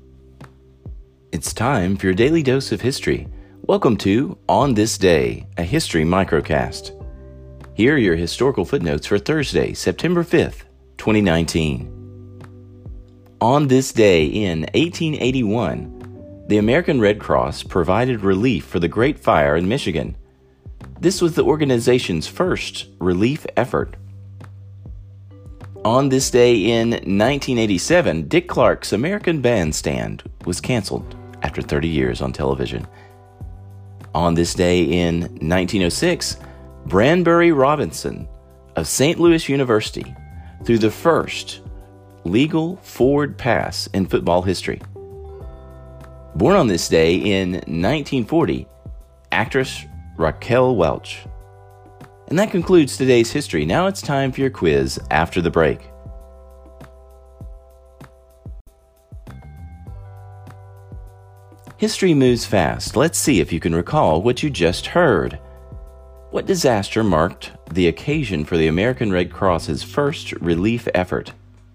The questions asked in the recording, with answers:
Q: What disaster marked the occasion for the American Red Cross's first relief effort?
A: the Great Fire in Michigan that happened in 1881.